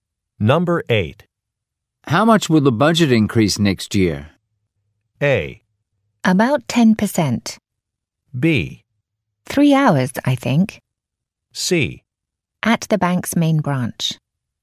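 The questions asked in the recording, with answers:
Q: How much will the budget increase next year?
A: A: About 10%.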